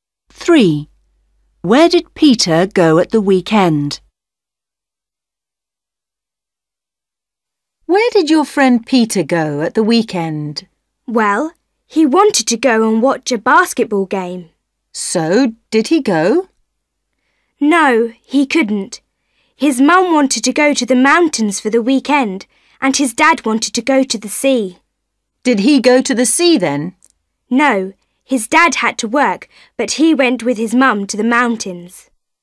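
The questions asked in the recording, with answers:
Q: Where did Peter go at the weekend?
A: to the mountains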